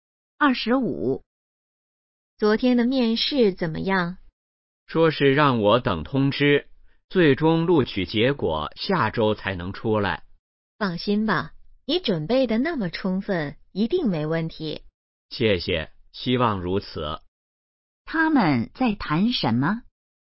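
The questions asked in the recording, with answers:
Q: 他们在谈什么?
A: 面试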